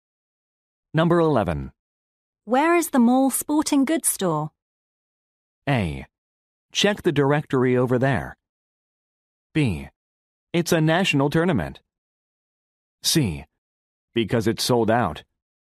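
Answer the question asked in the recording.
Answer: A: Check the directory over there.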